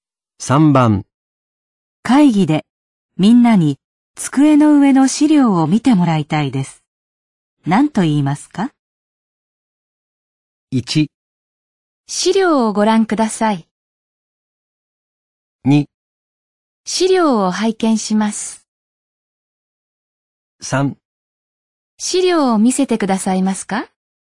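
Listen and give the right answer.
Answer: 1: 資料をご覧ください。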